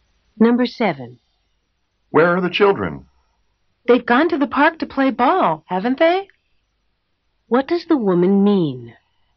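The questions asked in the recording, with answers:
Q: What does the woman mean?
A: She thinks the children went to the park to play ball, but she isn't sure.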